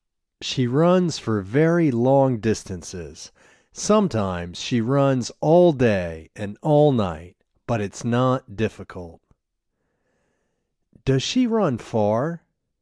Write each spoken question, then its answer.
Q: Does she run far?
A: Yes, she runs for very long distances.